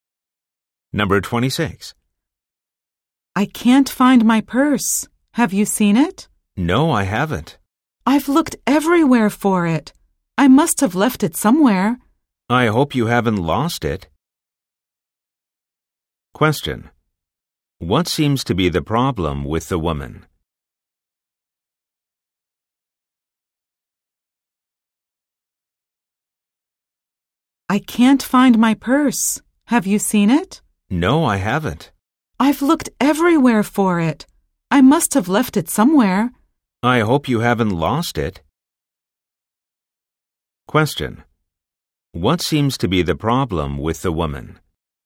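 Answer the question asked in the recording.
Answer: She can't find her purse.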